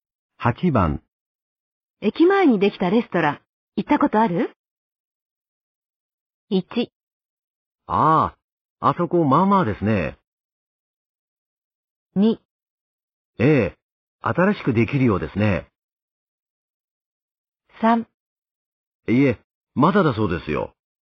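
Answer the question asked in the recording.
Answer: 1: ああ、あそこまあまあですね。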